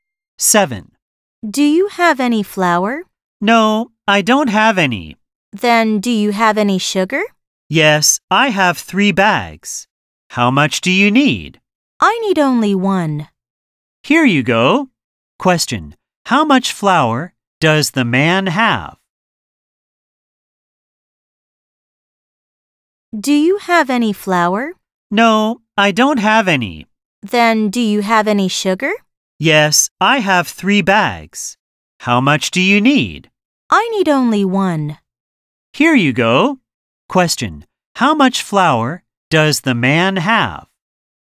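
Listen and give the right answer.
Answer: None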